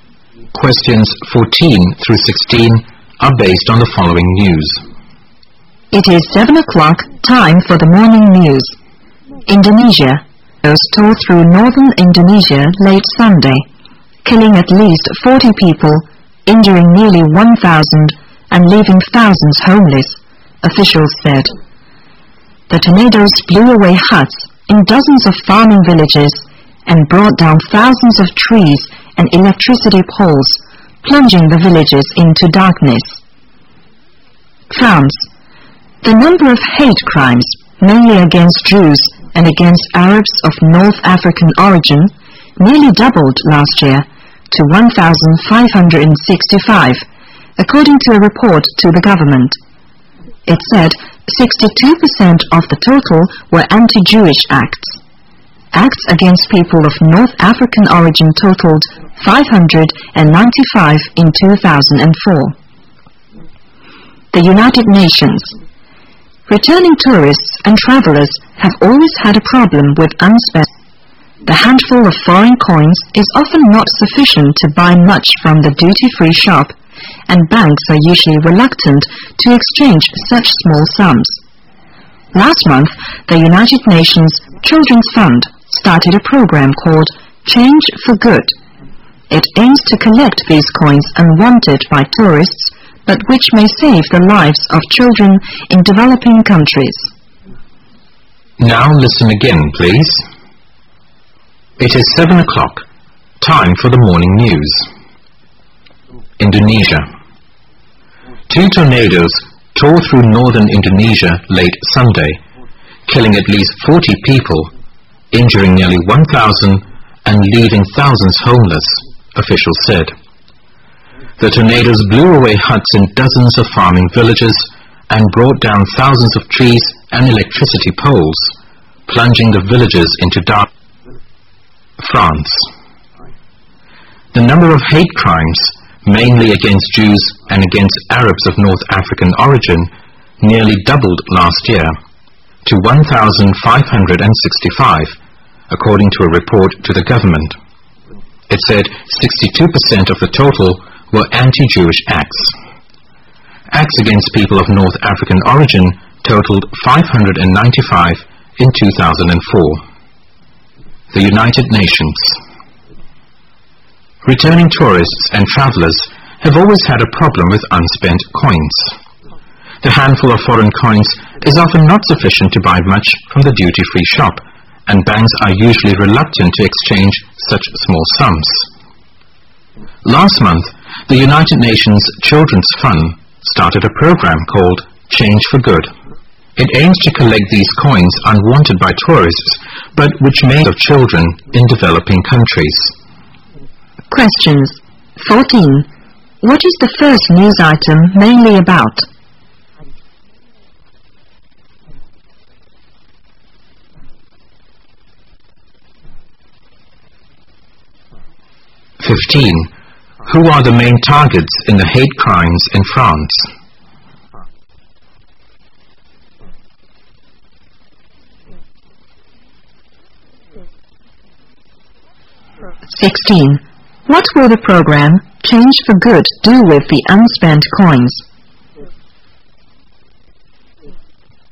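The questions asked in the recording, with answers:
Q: What is the first news item mainly about?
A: Tornadoes in northern Indonesia

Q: Who are the main targets in the hate crimes in France?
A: Jews and Arabs of North African origin

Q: What will the program Change for Good do with the unspent coins?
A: Use them to help save children in developing countries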